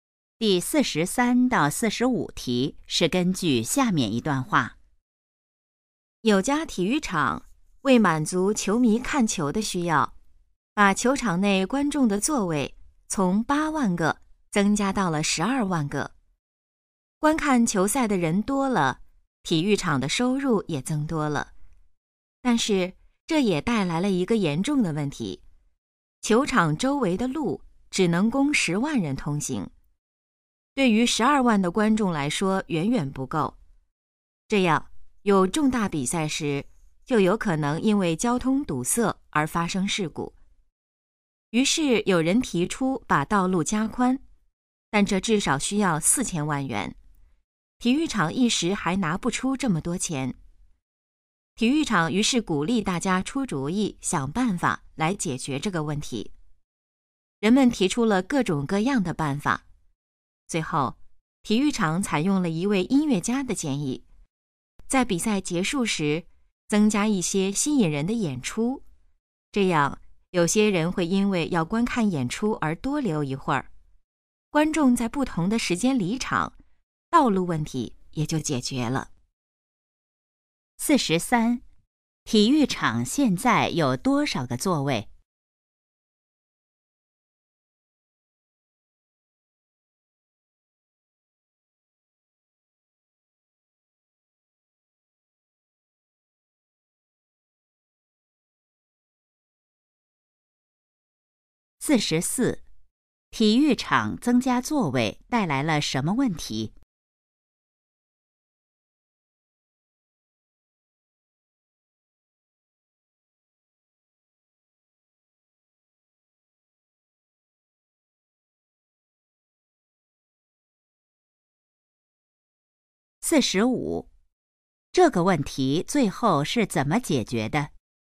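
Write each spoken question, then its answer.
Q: 体育场现在有多少个座位?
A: 12万个

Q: 体育场增加座位带来了什么问题?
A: 交通问题,周围的路不够通行

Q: 这个问题最后是怎么解决的?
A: 比赛结束时增加演出,让观众在不同时间离场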